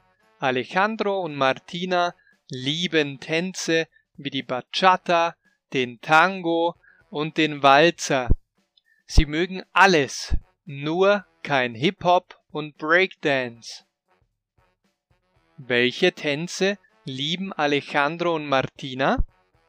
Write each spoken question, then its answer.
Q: Welche Tänze lieben Alejandro und Martina?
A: Tänze wie die Bachata, den Tango und den Walzer.